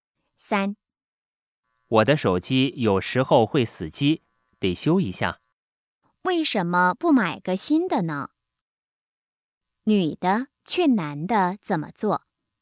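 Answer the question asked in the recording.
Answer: 买个新的手机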